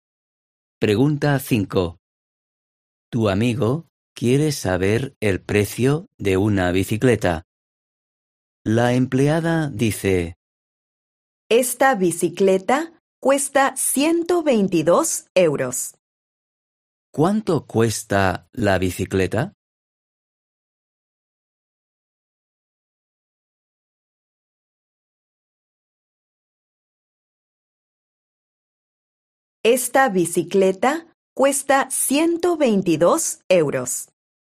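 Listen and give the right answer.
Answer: 122 euros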